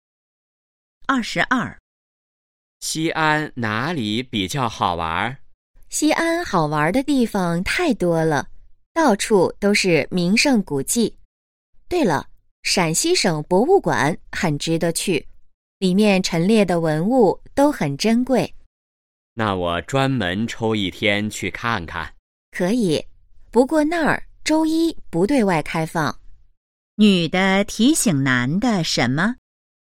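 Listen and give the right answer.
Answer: 陕西省博物馆周一不对外开放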